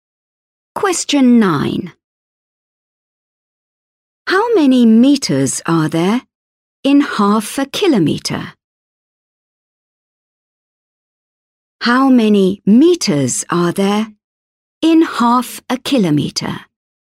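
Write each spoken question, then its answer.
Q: How many meters are there in half a kilometer?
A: 500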